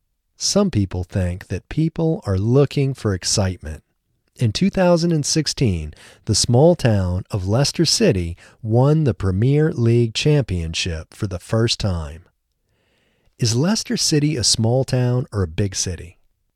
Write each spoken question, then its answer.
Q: Is Leicester City a small town or a big city?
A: Leicester City is a small town.